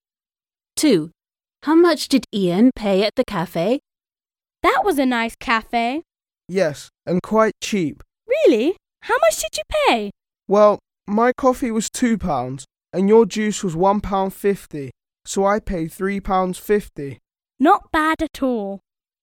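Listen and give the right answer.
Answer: £3.50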